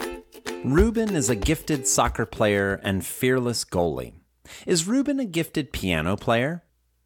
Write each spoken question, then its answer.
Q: Is Ruben a gifted piano player?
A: No, Ruben isn't a gifted piano player.